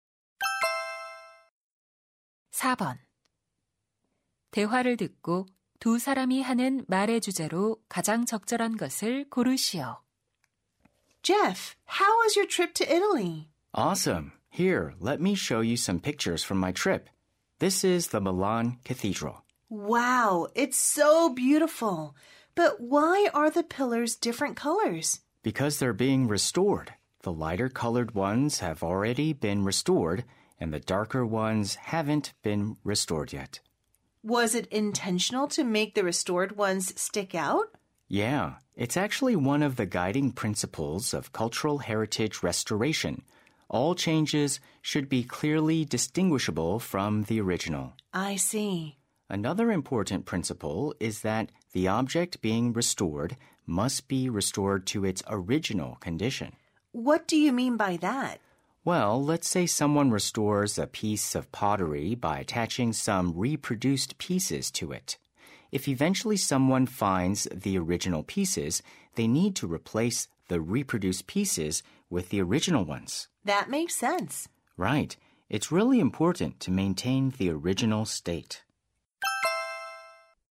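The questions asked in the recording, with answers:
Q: 대화를 듣고 두 사람이 하는 말의 주제로 가장 적절한 것을 고르시오.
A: 문화유산 복원의 원칙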